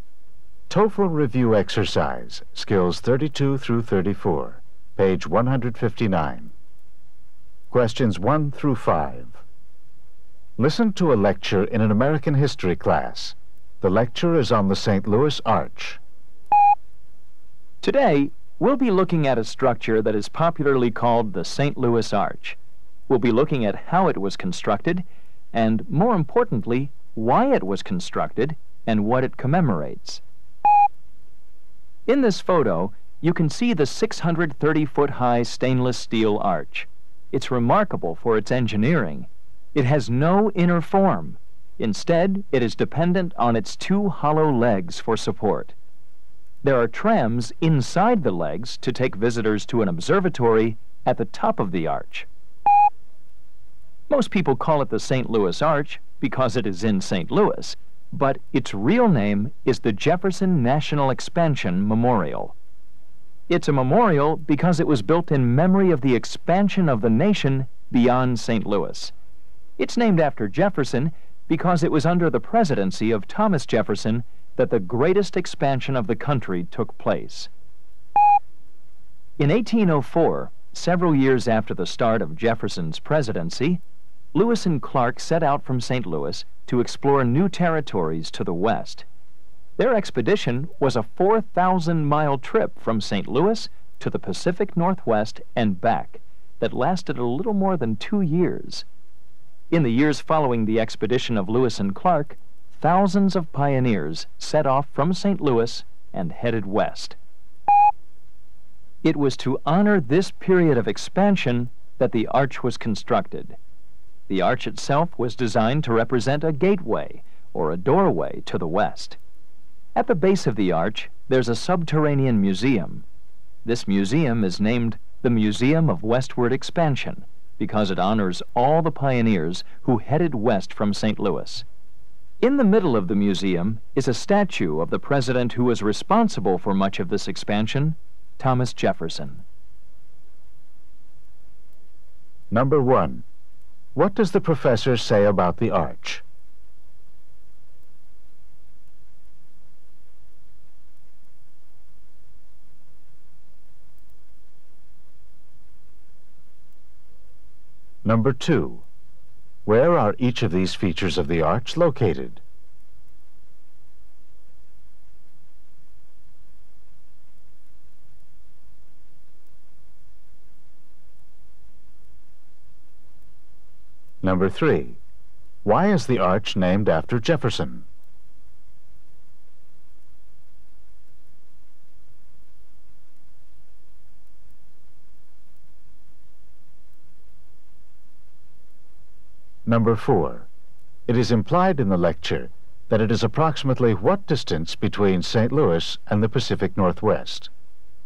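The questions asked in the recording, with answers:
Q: Why is the arch named after Jefferson?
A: The country's greatest expansion took place while he was president

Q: It is implied in the lecture that it is approximately what distance between St.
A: About 2,000 miles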